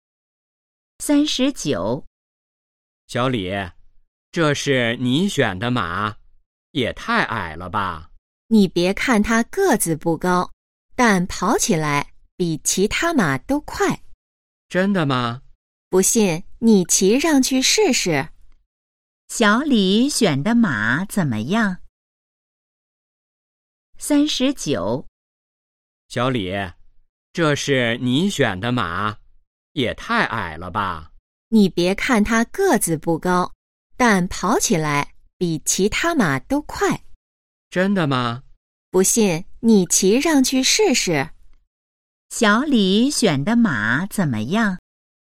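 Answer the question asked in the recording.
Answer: 个子矮,但跑得很快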